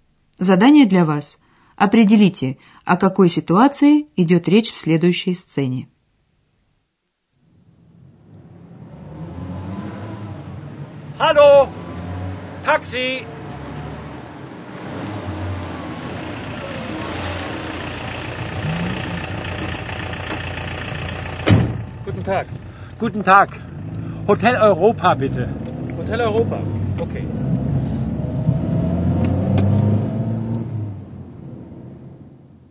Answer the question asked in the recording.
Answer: Человек стоит на улице, останавливает такси, такси, и объясняет таксисту, куда ему нужно.